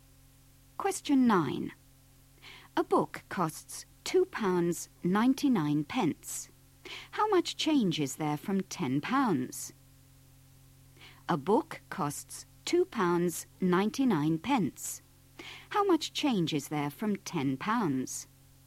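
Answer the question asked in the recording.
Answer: £7.01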